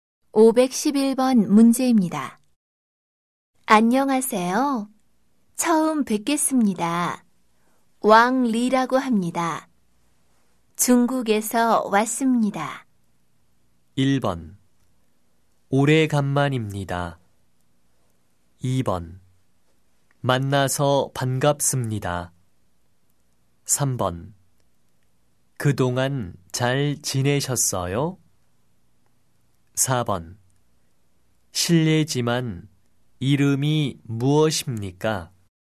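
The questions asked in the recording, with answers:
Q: 안녕하세요. 처음 뵙겠습니다. 왕 리라고 합니다. 중국에서 왔습니다.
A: 2: 만나서 반갑습니다.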